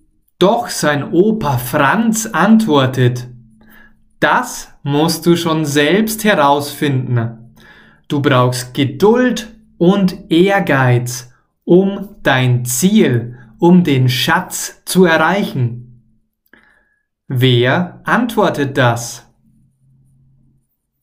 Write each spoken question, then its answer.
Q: Wer antwortet das?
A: Sein Opa Franz. Timos Opa Franz antwortet das.